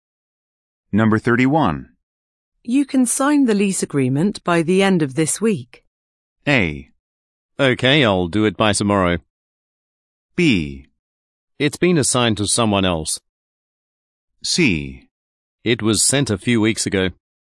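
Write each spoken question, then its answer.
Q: You can sign the lease agreement by the end of this week.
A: A: Okay, I'll do it by tomorrow.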